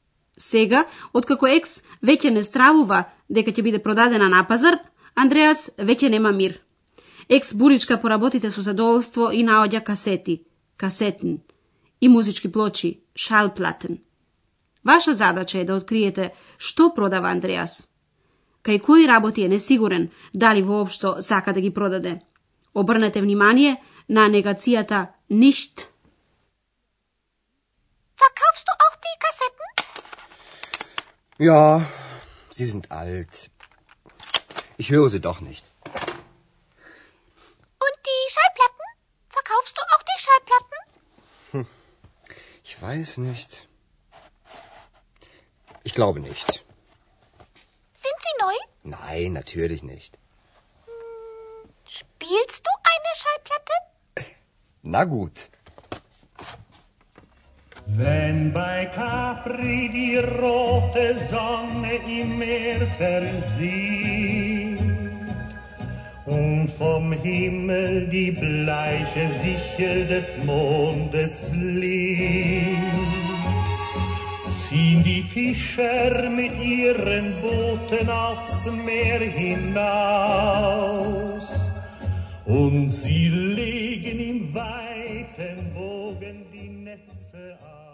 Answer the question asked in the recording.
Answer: Андреас сака да ги продаде касетите.